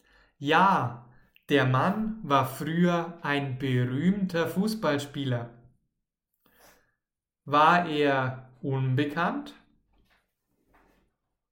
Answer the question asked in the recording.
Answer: Nein, er war nicht unbekannt.